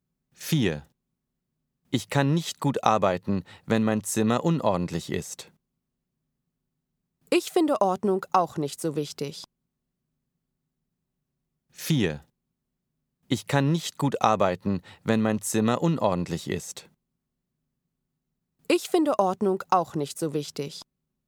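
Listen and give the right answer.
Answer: U: unlogisch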